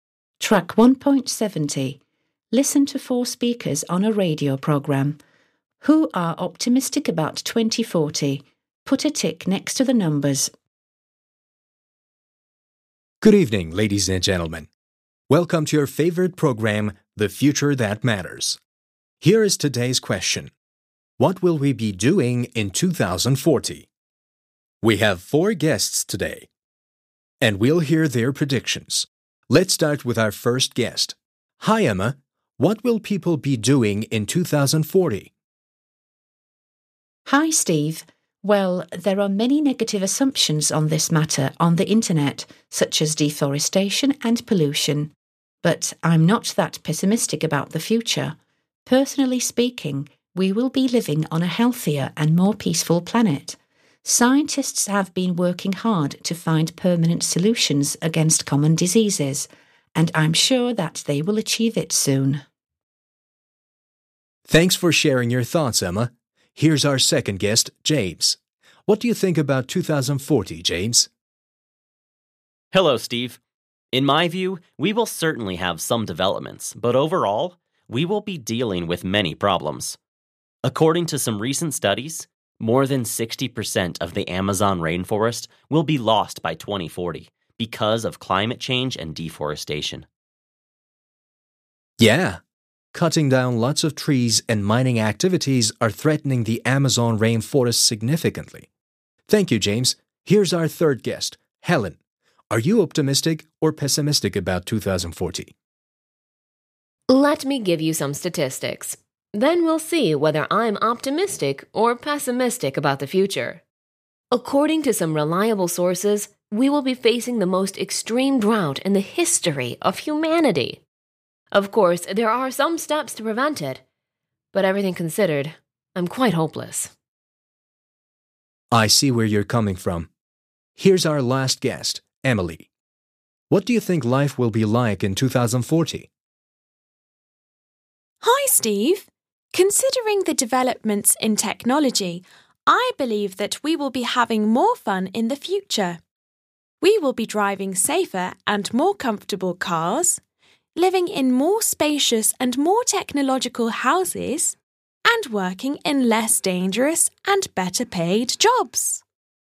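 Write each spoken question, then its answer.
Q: Who are optimistic about 2040?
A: Emma and Emily (speakers 1 and 4)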